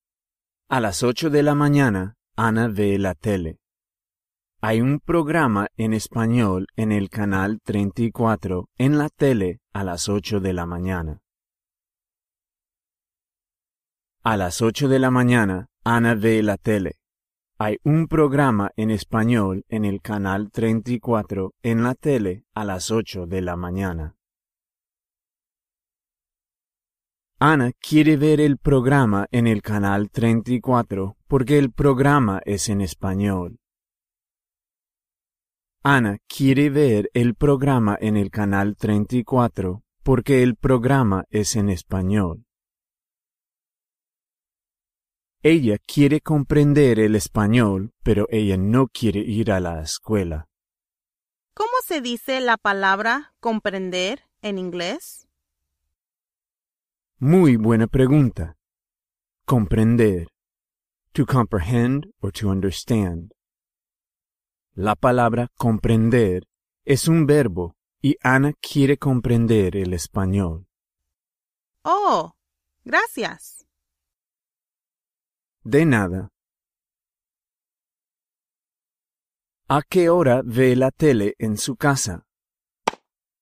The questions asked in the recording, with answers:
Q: ¿A qué hora ve la tele en su casa?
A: Ana ve la tele a las 8:10 de la mañana.